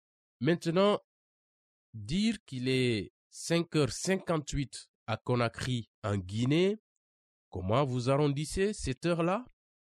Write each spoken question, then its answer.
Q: Maintenant, dire qu'il est 5h58 à Conakry, en Guinée, comment vous arrondissez cette heure-là?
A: J'arrondis 5h58 à 6h.